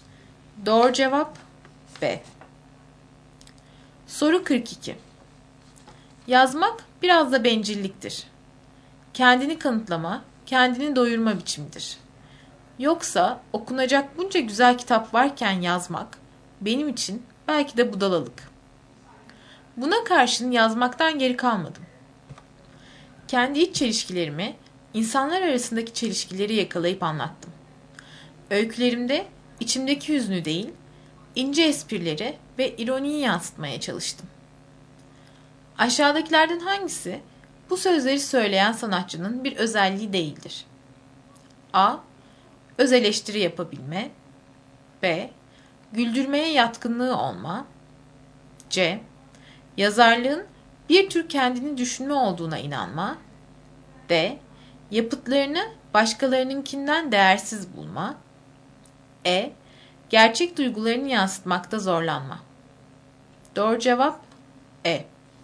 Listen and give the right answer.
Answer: Doğru cevap E.